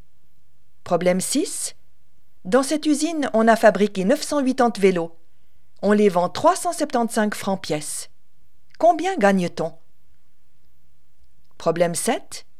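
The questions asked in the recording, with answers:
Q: Combien gagne-t-on?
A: 367 500 francs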